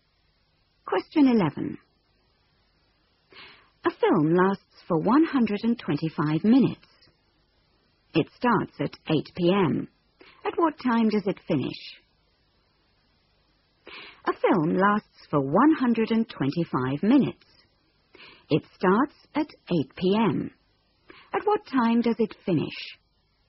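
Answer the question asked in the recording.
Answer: 10:05 p.m.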